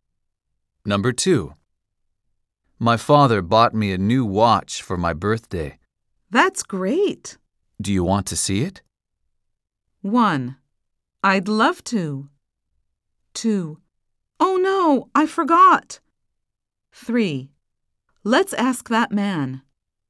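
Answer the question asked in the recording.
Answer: 1: I'd love to.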